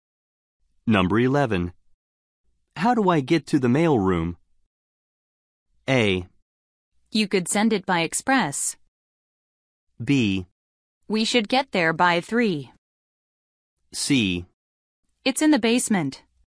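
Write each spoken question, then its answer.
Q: How do I get to the mail room?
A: C: It's in the basement.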